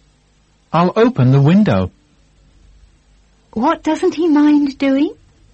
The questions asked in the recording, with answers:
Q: What doesn't he mind doing?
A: He doesn't mind opening the window.